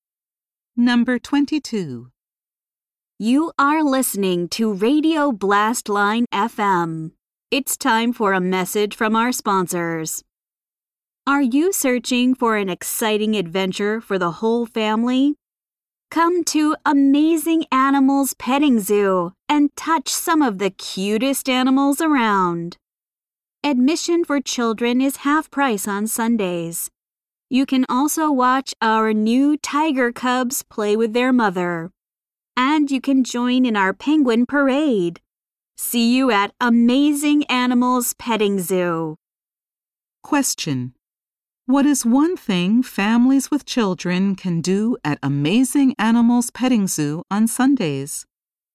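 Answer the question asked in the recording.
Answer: Get in at half price for children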